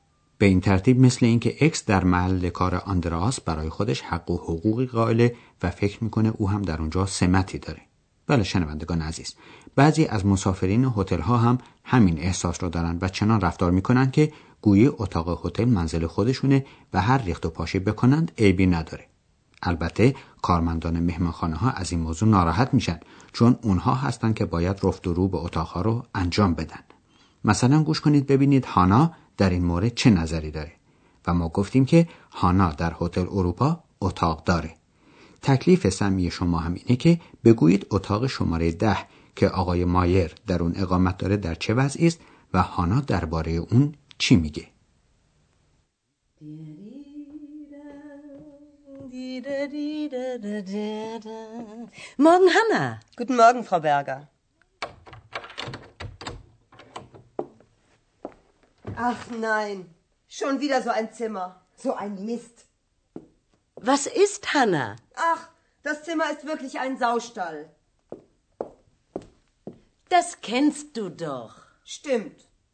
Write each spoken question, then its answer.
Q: تکلیف سمی شما هم اینه که بگویید اتاق شماره ده که آقای مایر در اون اقامت داره در چه وضعی است و هانا درباره اون چی میگه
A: پس به عقیده هانا طویله خوک ها هم از این اتاق شلوغتر و کسیفتر نیست